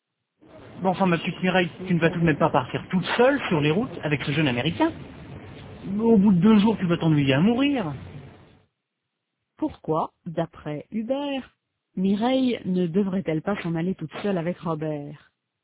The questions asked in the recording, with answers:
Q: Pourquoi, d'après Hubert, Mireille ne devrait-elle pas s'en aller toute seule avec Robert?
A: Parce qu'au bout de 2 jours, elle va s'ennuyer à mourir.